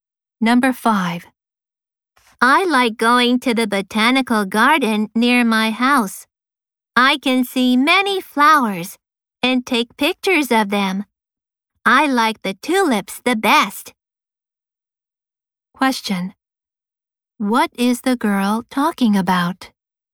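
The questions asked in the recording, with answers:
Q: What is the girl talking about?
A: A botanical garden near her house.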